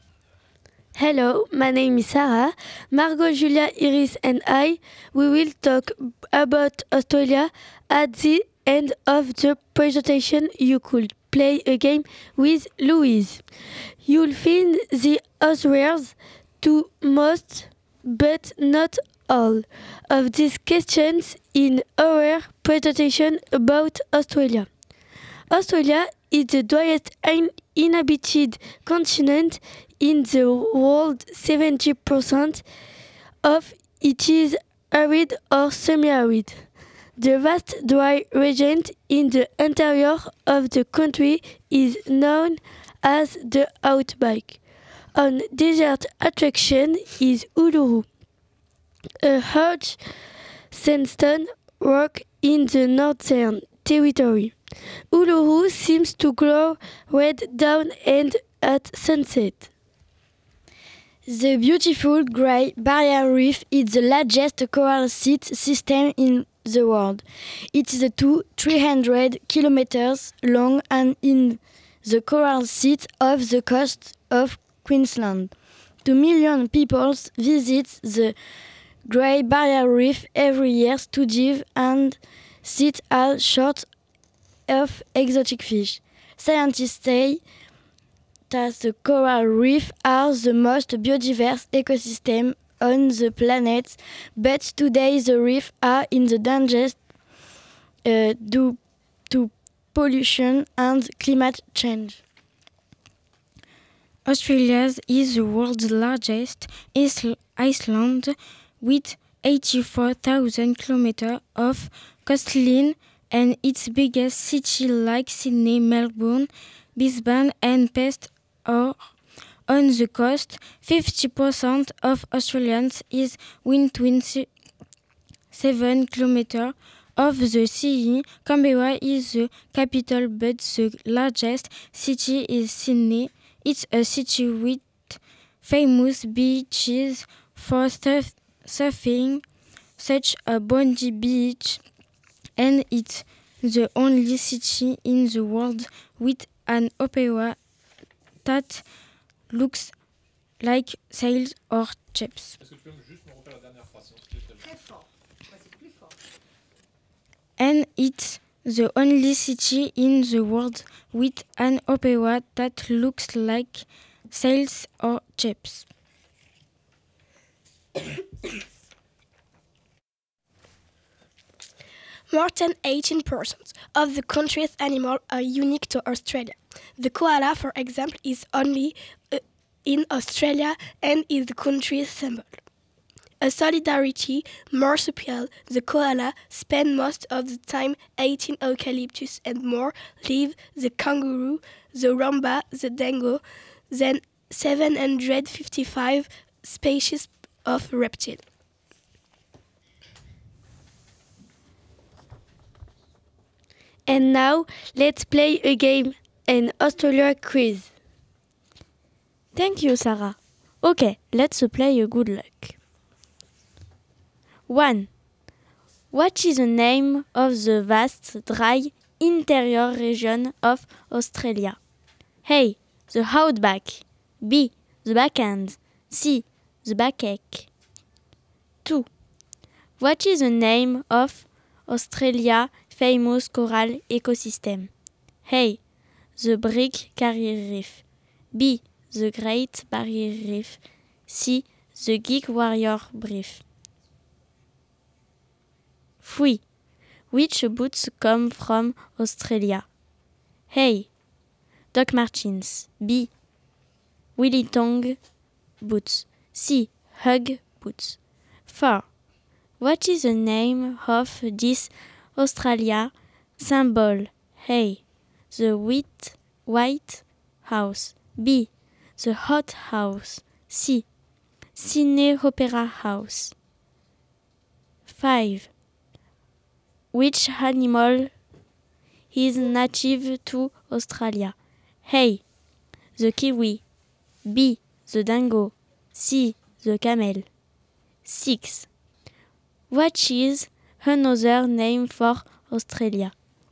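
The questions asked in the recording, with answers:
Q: What is the name of the vast, dry, interior region of Australia?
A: A: The Outback

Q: What is the name of Australia famous coral ecosystem?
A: B: The Great Barrier Reef

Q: Which animal is native to Australia?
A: B: The dingo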